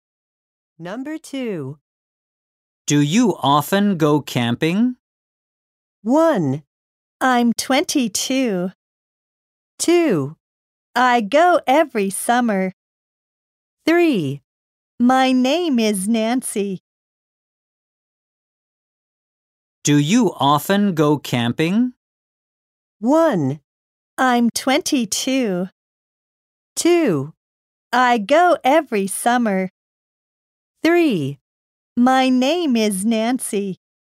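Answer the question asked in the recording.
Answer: 2: I go every summer.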